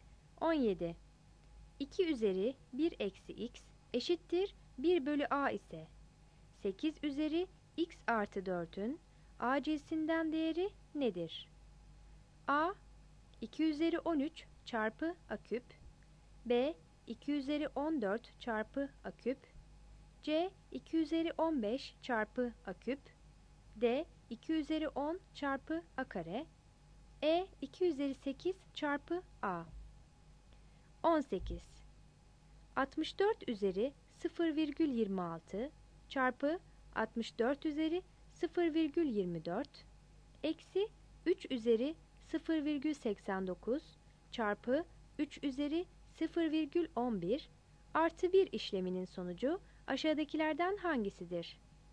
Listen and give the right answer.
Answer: 17 C